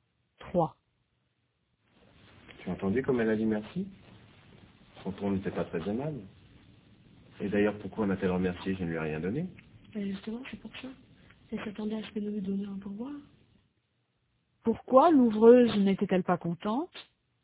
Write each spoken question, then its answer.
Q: Pourquoi l'ouvreuse n'était-elle pas contente?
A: Parce qu'elle s'attendait à ce qu'il lui donne un pourboire.